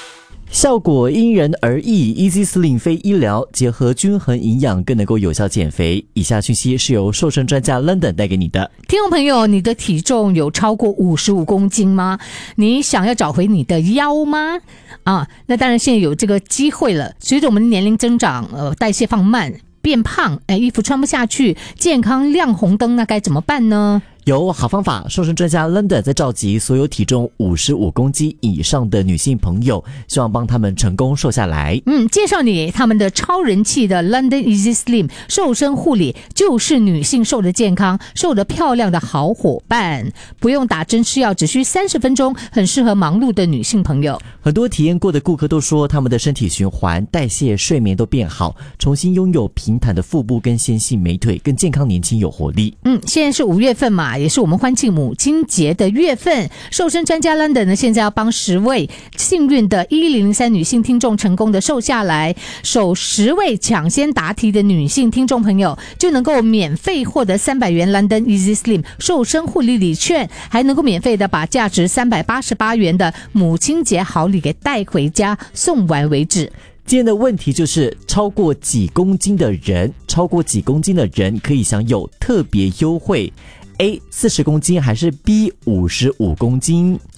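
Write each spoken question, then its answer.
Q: 超过几公斤的人可以享有特别优惠?A 40公斤还是 B 55公斤?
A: B: 55公斤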